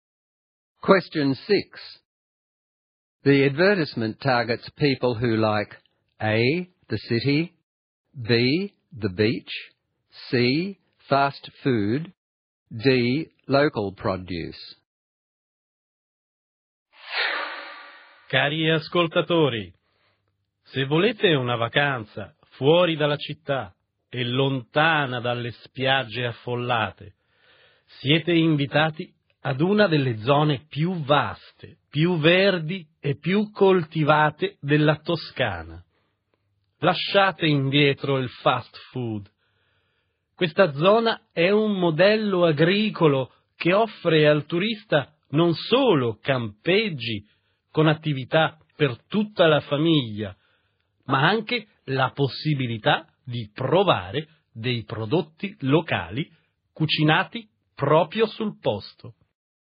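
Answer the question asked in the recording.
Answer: D: local produce.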